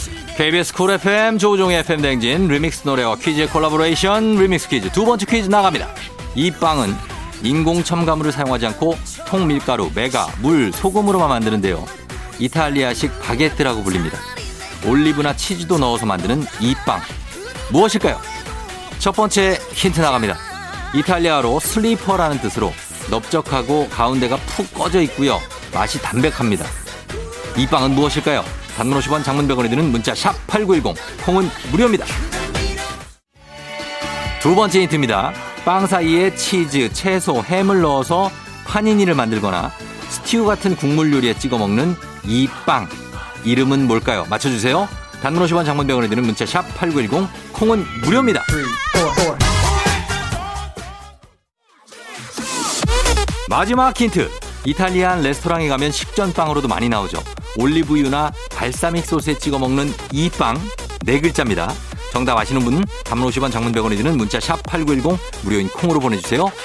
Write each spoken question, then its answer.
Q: 이 빵은 무엇일까요?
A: 치아바타입니다